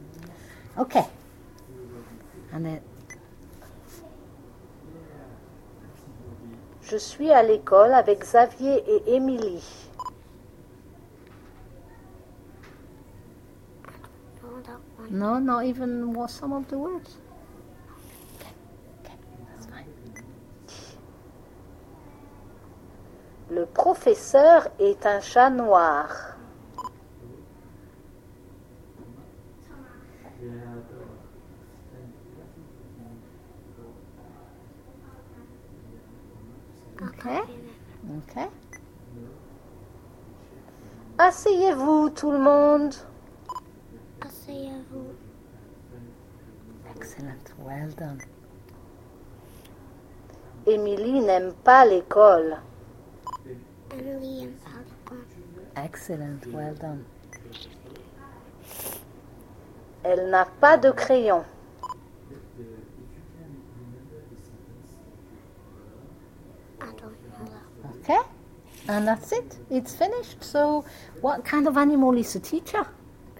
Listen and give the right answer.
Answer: A cat.